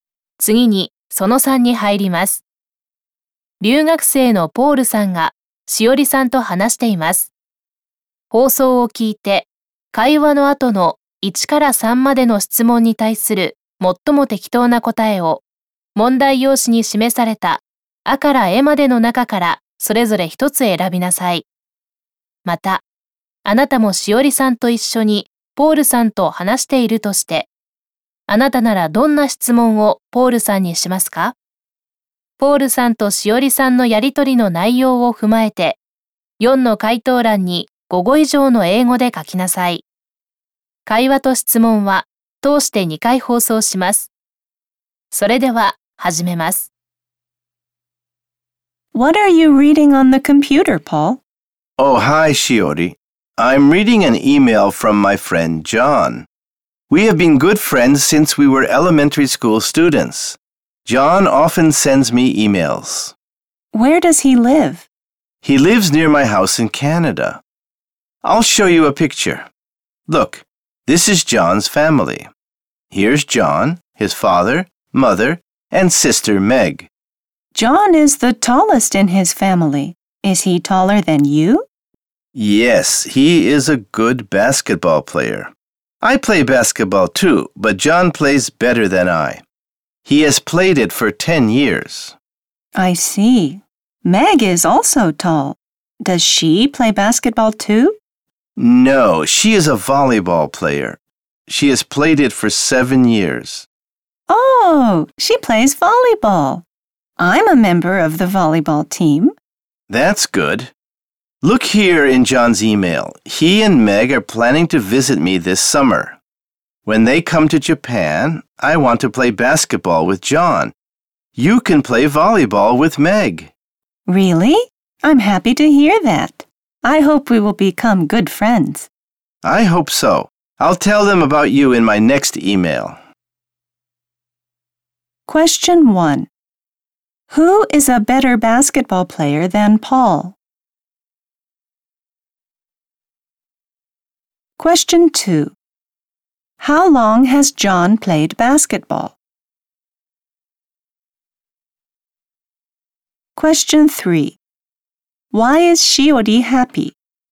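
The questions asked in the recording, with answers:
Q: Who is a better basketball player than Paul?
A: John

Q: How long has John played basketball?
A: For 10 years

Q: Why is Shiori happy?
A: Because she can play volleyball with Meg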